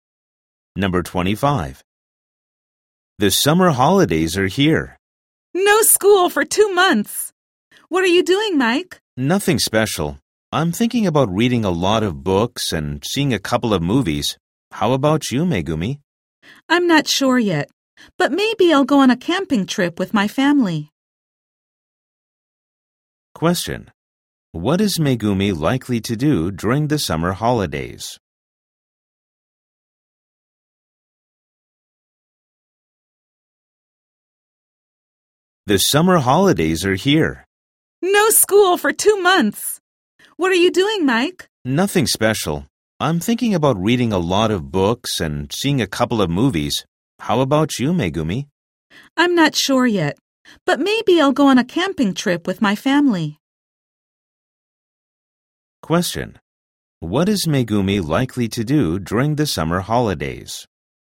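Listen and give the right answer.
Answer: Go on a camping trip with her family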